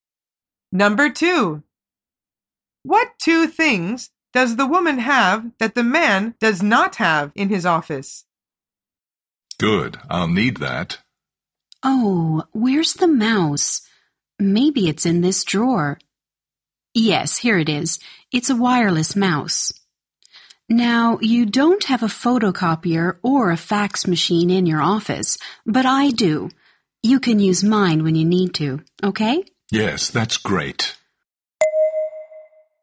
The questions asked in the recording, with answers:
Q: What two things does the woman have that the man does not have in his office?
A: The answer is a photocopier and a fax machine.